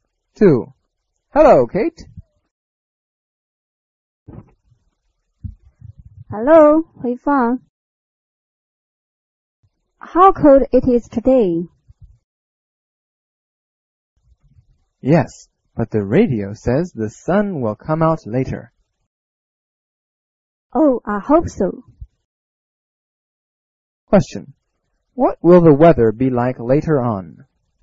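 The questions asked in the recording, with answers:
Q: What will the weather be like later on?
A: Sunny; the sun will come out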